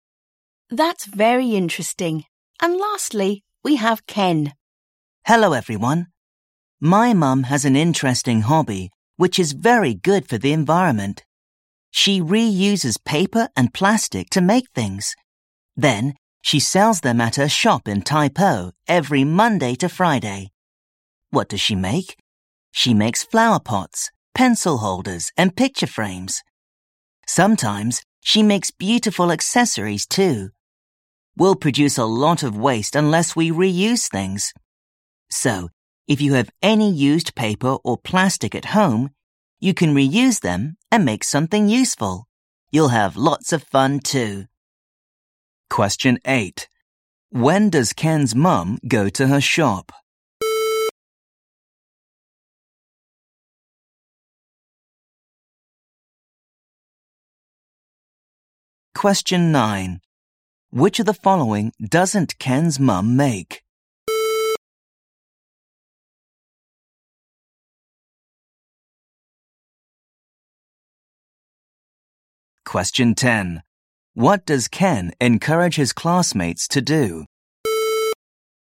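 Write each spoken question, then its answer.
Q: When does Ken's mum go to her shop?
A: every Monday to Friday

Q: What does Ken encourage his classmates to do?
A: reuse used paper or plastic to make something useful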